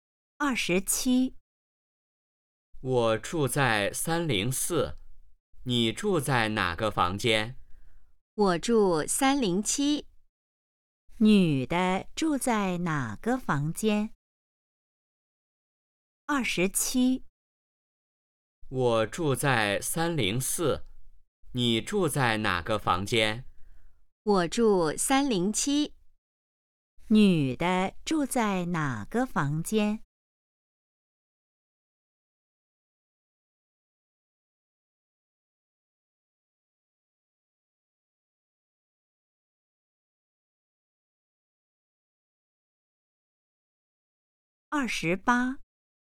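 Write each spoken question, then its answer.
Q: 女的住在哪个房间?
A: 307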